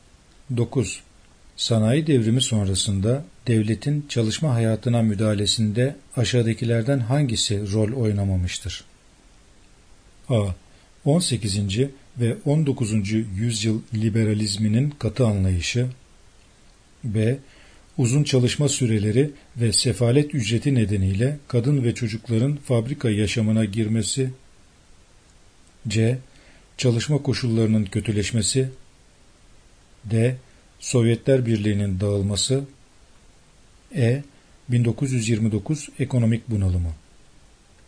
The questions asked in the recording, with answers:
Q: Sanayi devrimi sonrasında devletin çalışma hayatına müdahalesinde aşağıdakilerden hangisi rol oynamamıştır?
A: Yanıt D. Sovyetler Birliği'nin dağılması.